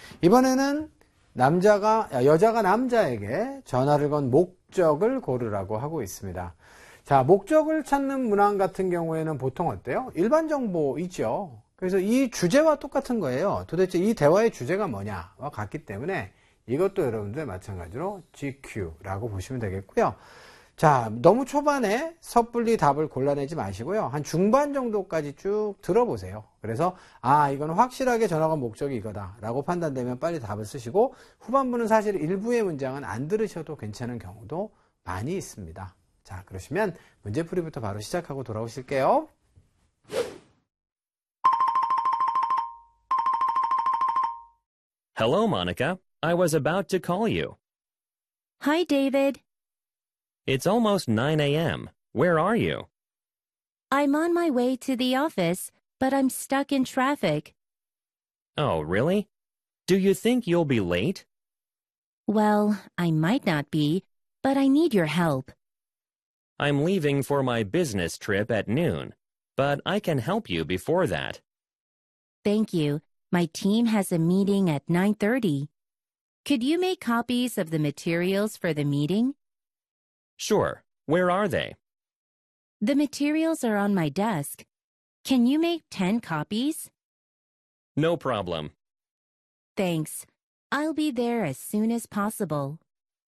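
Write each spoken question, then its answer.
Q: 이번에는 여자가 남자에게 전화를 건 목적을 고르라고 하고 있습니다.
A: 회의 자료 10부 복사를 부탁하려고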